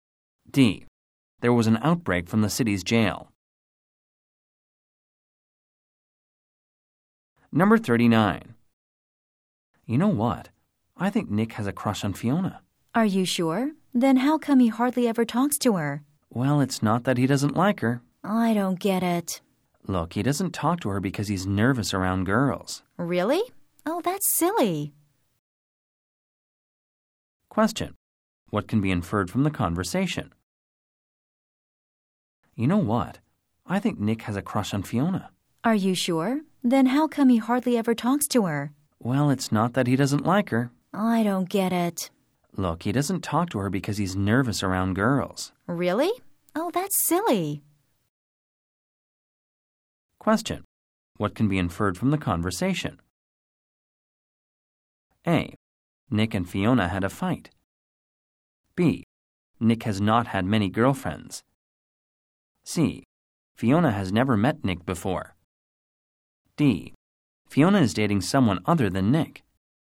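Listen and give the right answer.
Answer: B: Nick has not had many girlfriends.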